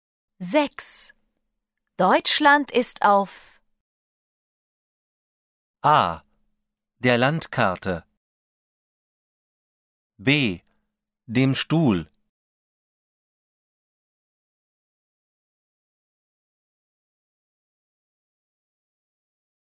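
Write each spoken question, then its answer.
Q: Deutschland ist auf... A. Der Landkarte. B. Dem Stuhl.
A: A: Der Landkarte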